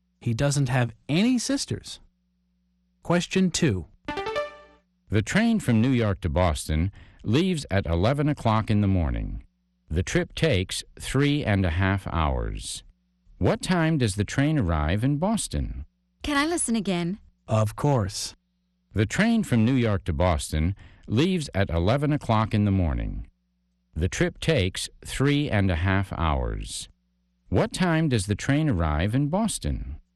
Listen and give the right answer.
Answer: It arrives at 2:30.